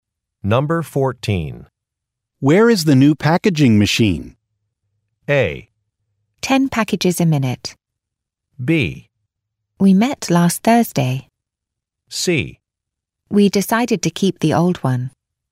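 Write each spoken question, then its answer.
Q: Where is the new packaging machine?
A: C: We decided to keep the old one.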